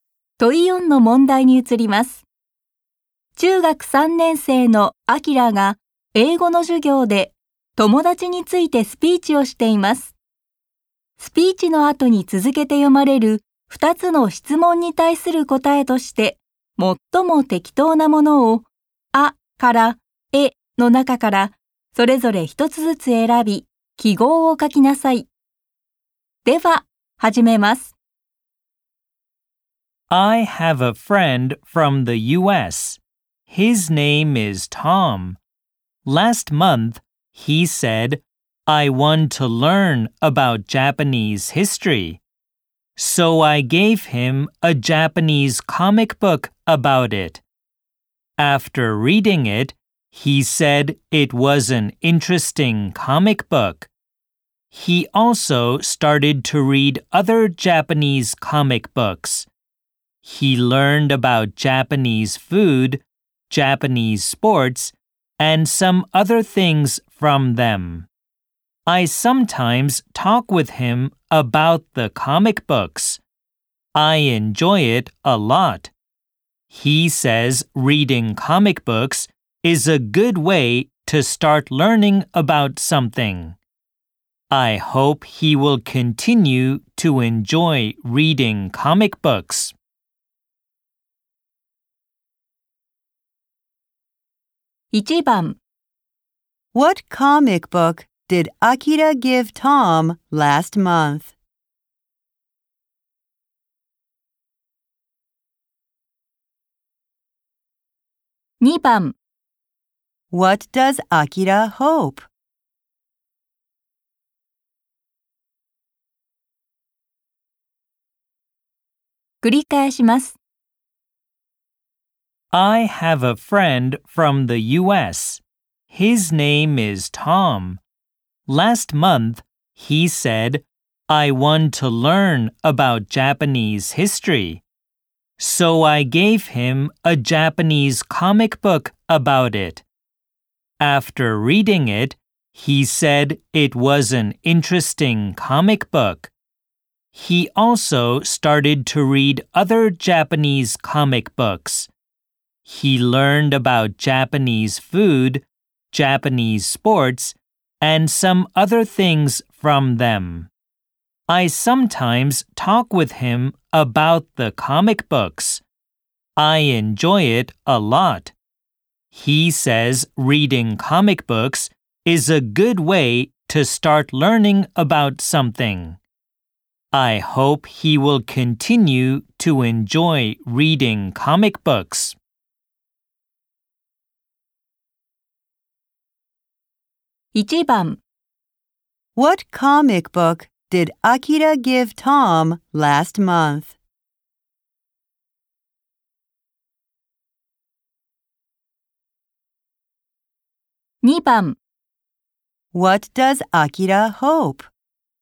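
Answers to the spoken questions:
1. A Japanese comic book about Japanese history
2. He hopes Tom will continue to enjoy reading comic books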